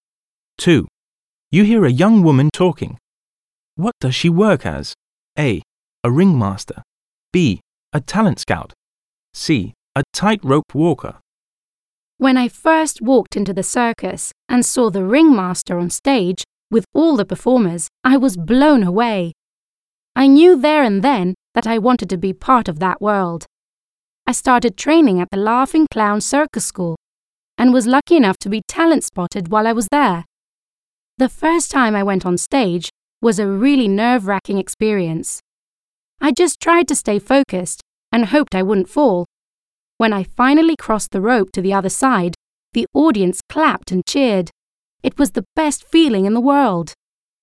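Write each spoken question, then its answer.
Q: What does she work as?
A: C: A tightrope walker.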